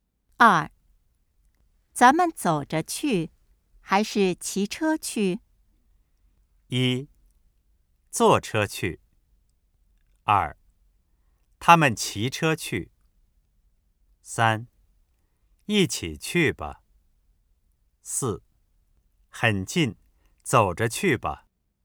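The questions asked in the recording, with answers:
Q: 咱们走着去还是骑车去?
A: 四: 很近,走着去吧。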